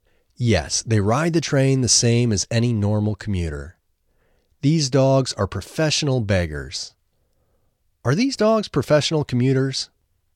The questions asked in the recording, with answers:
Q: Are these dogs professional commuters?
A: No, they aren't professional commuters.